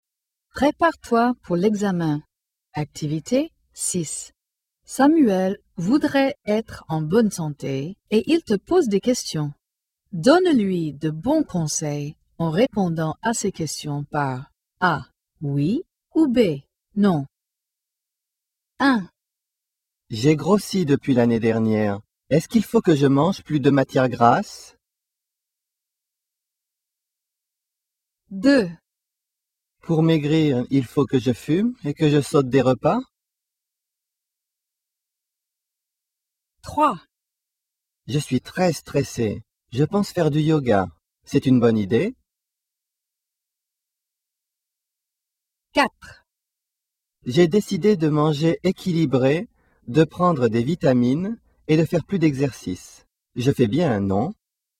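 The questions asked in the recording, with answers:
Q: Est-ce qu'il faut que je mange plus de matière grasse?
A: B: non

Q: Pour maigrir, il faut que je fume et que je saute des repas?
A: B: non

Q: C'est une bonne idée?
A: A: oui

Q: Je fais bien, non?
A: A: oui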